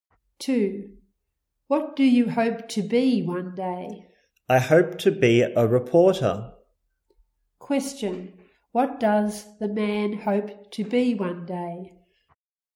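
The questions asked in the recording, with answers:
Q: What does the man hope to be one day?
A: A reporter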